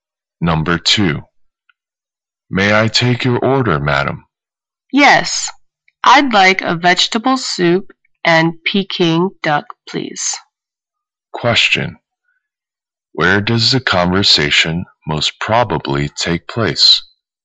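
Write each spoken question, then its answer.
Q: Where does the conversation most probably take place?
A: In a restaurant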